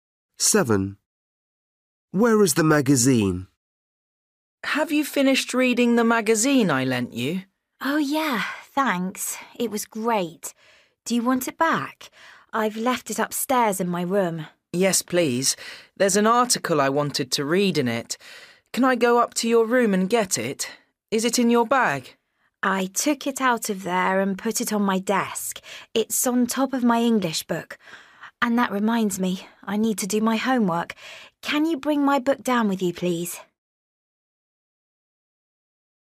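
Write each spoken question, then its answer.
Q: Where is the magazine?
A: on the desk, on top of the English book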